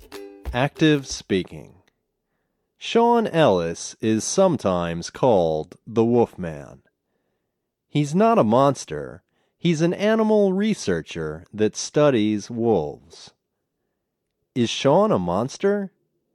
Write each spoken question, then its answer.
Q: Is Sean a monster?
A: No, he's not a monster. He's a wolf researcher.